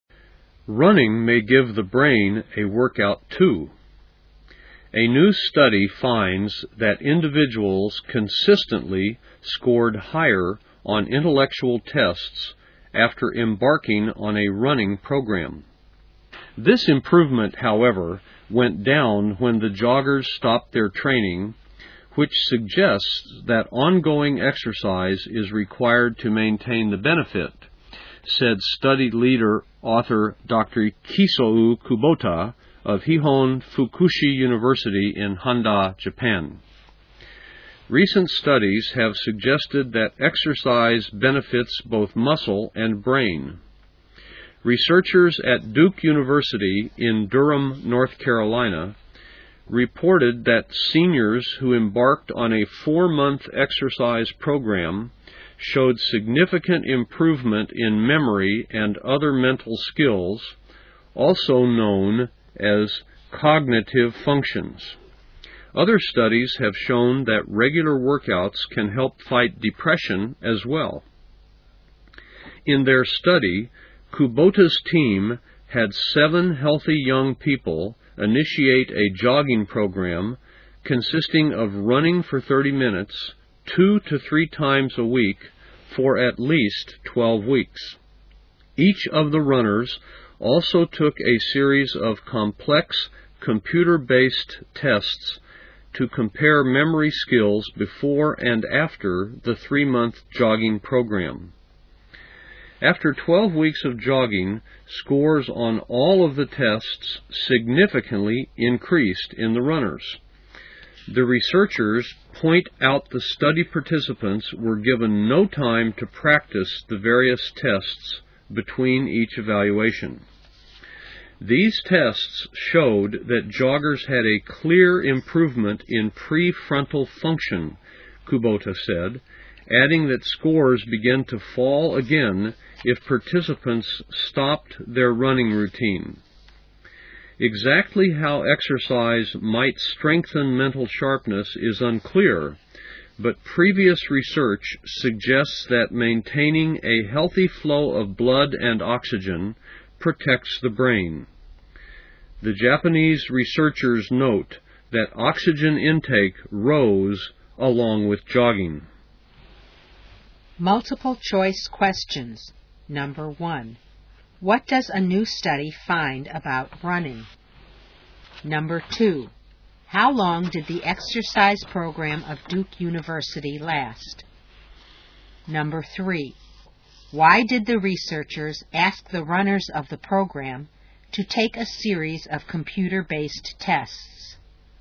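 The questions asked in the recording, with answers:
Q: What does a new study find about running?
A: People scored higher on intellectual tests after starting a running program

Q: How long did the exercise program of Duke University last?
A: 4 months

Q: Why did the researchers ask the runners of the program to take a series of computer-based tests?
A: To compare their memory skills before and after the jogging program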